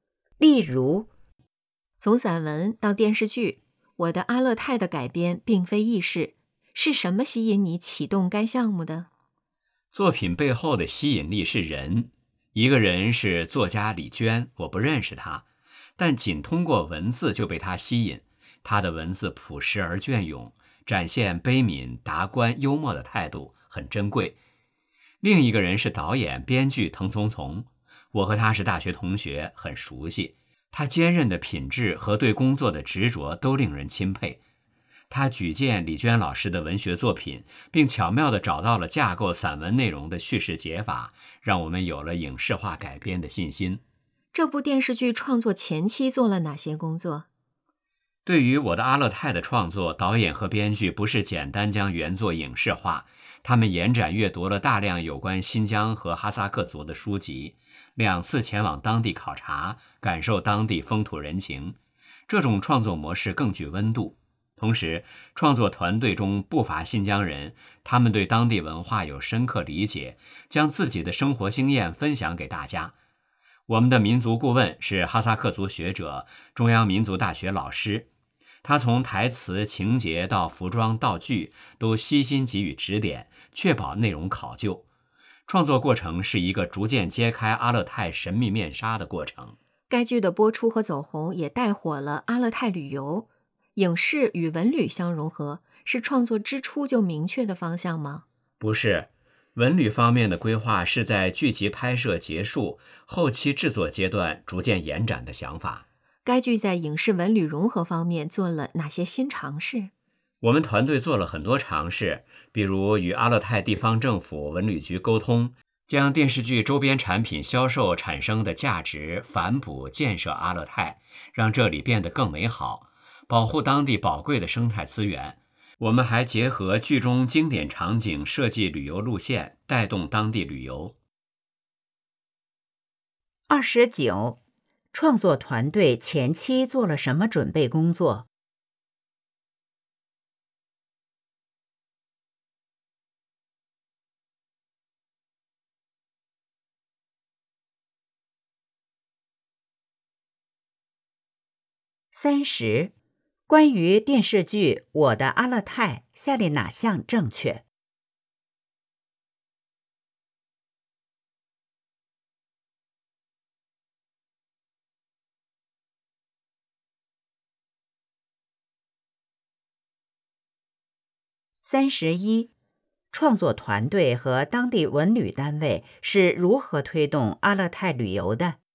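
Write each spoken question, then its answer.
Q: 创作团队前期做了什么准备工作?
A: 阅读大量有关新疆和哈萨克族的书籍,两次前往当地考察

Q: 创作团队和当地文旅单位是如何推动阿勒泰旅游的?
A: 用周边产品销售收益反哺阿勒泰建设,并结合剧中经典场景设计旅游路线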